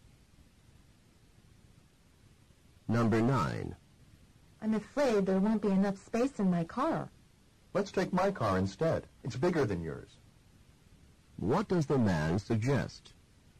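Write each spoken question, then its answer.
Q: What does the man suggest?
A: Taking his car because it is bigger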